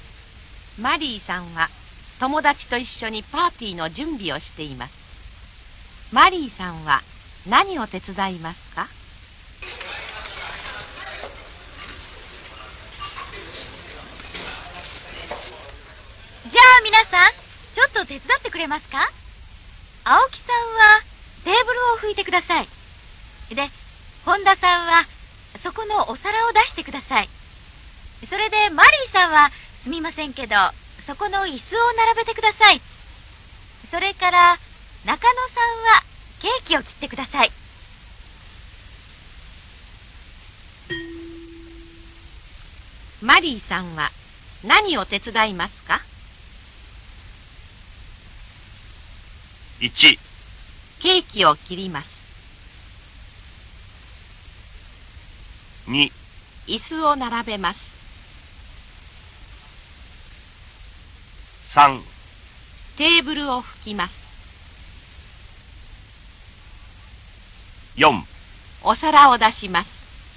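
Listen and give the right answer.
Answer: 2: 椅子を並べます。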